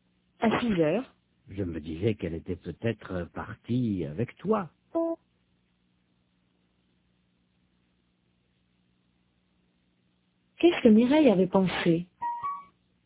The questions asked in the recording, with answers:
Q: Qu'est-ce que Mireille avait pensé?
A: Qu'elle était peut-être partie avec Robert.